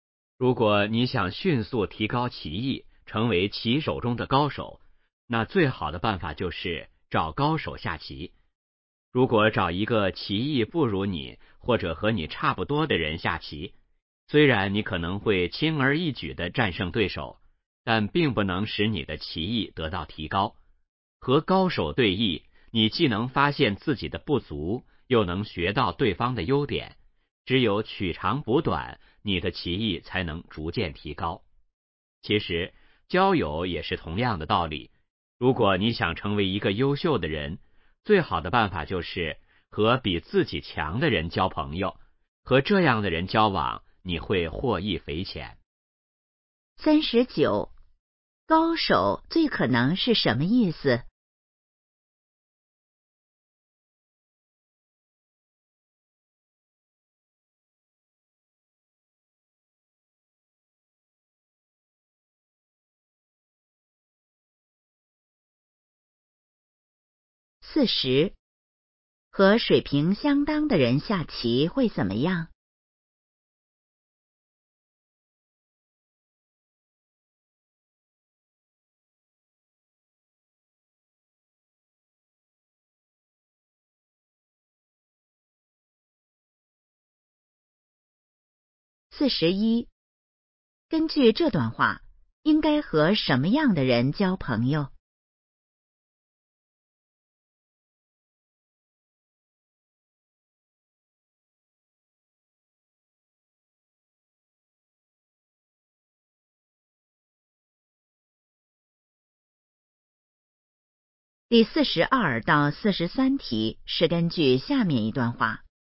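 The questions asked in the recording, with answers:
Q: 高手最可能是什么意思?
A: 技艺高超的人

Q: 和水平相当的人下棋会怎么样?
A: 棋艺得不到提高

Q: 根据这段话,应该和什么样的人交朋友?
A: 比自己强的人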